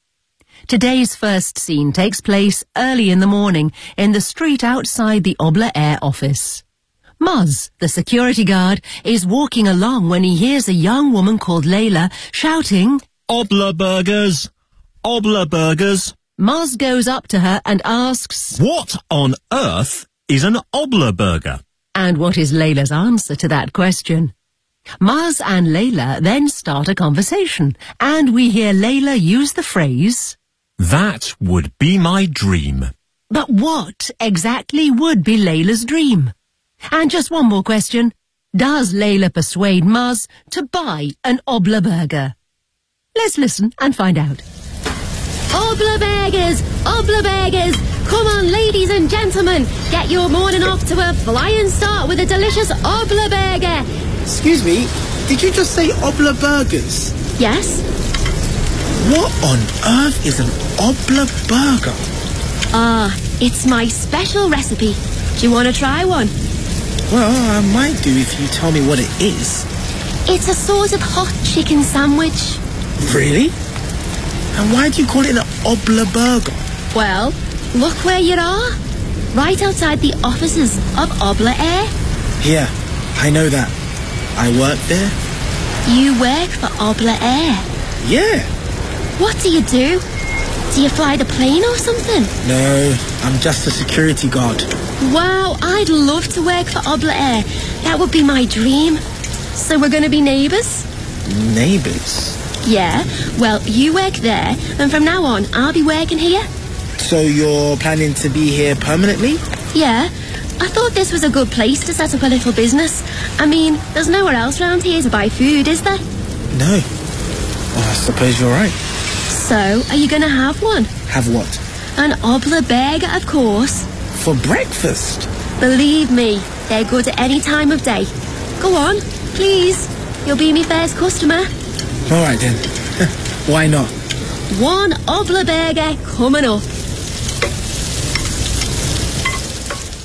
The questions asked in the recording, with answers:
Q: And what is Layla's answer to that question?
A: It's a sort of hot chicken sandwich.

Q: But what exactly would be Layla's dream?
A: I'd love to work for Obla Air.

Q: Does Layla persuade Muzz to buy an Obla Burger?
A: Yes, she does.